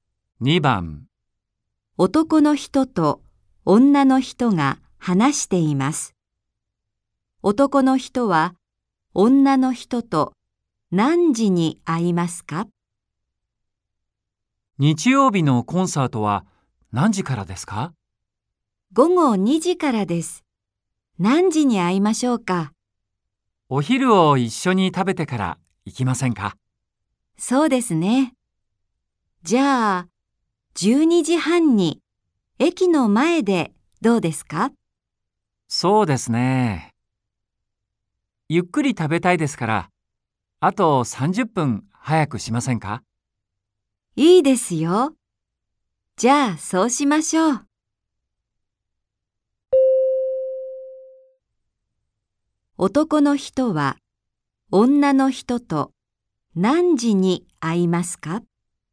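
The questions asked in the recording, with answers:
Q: 男の人は女の人と何時に会いますか?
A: 12時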